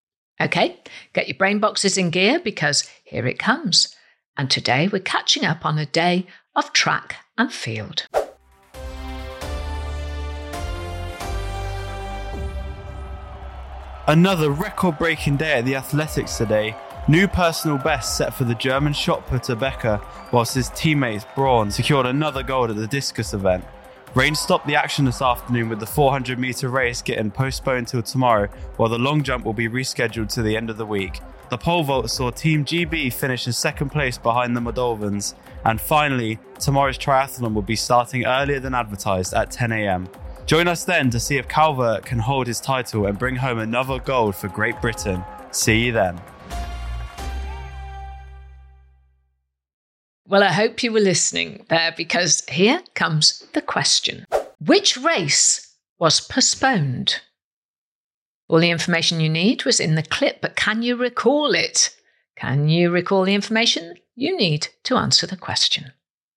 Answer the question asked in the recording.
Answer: the answer in the clip was the 400 metres race.